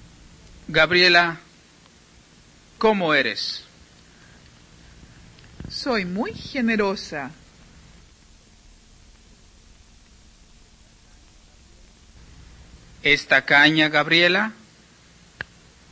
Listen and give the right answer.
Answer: No. Gabriela no es nada tacaña, al contrario, es muy generosa.